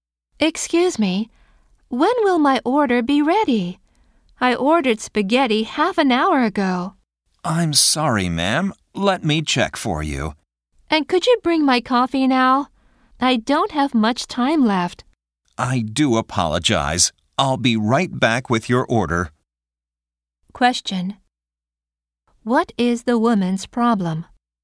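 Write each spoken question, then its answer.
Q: What is the woman's problem?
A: Her order (spaghetti and coffee) has not arrived yet, and she is short on time.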